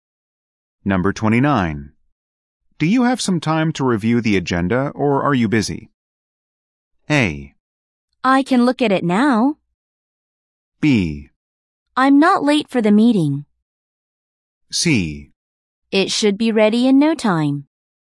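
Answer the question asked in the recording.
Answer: A: I can look at it now.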